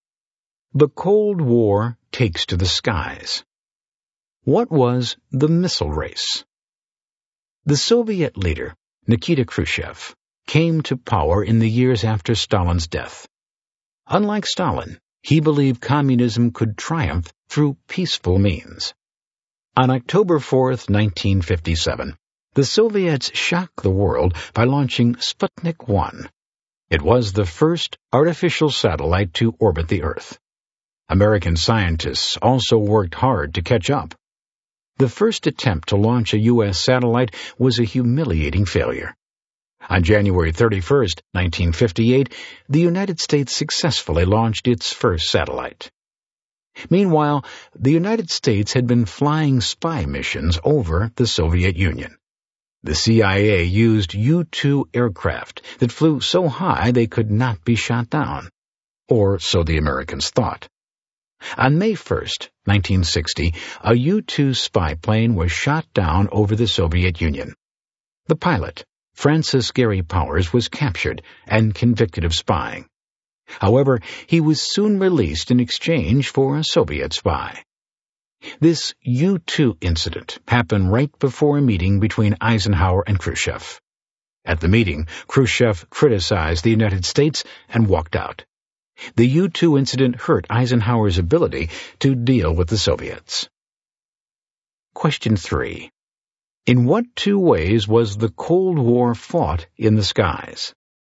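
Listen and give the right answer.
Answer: The satellite/missile race (Sputnik) and U-2 spy plane missions.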